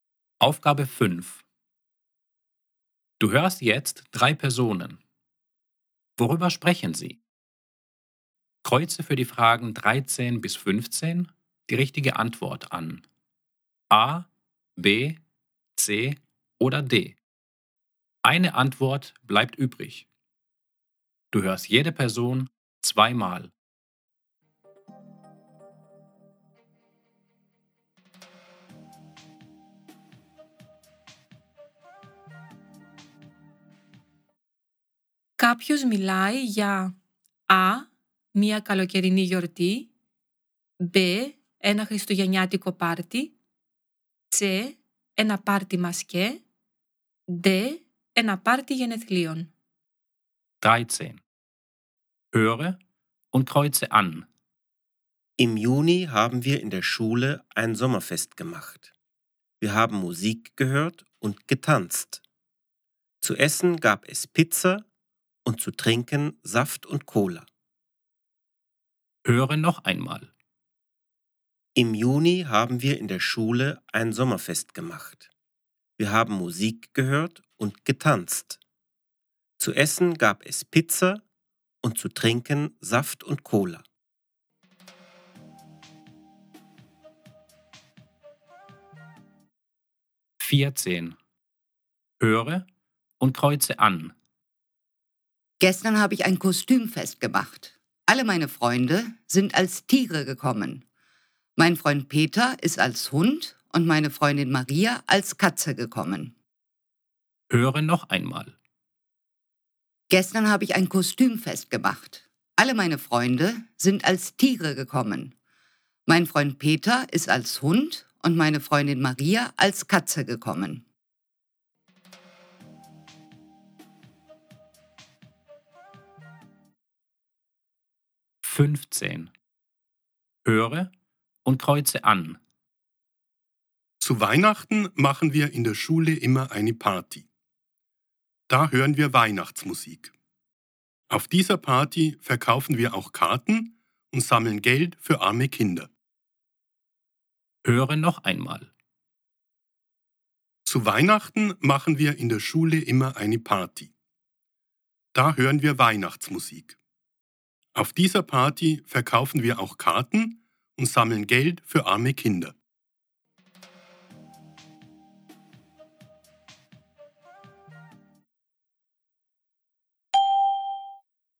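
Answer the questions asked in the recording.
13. A: ein Sommerfest
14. C: eine Kostümparty
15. B: eine Weihnachtsparty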